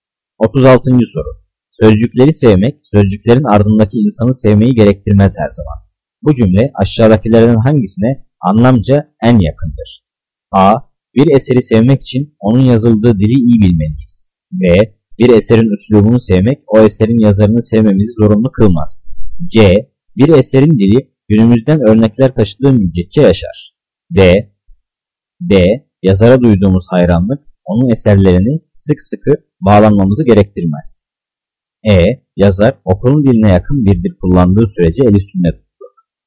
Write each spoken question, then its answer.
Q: Bu cümle aşağıdakilerden hangisine anlamca en yakındır?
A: Cevap B. Bir eserin üslubunu sevmek o eserin yazarını sevmemizi zorunlu kılmaz.